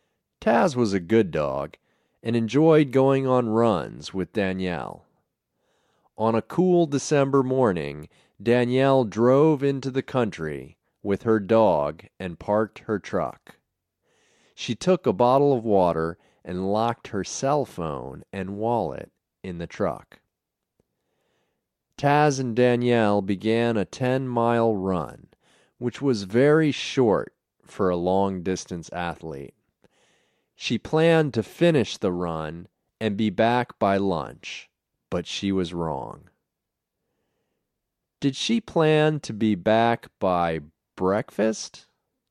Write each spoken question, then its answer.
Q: Did she plan to be back by breakfast?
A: No. She didn't plan to be back by breakfast.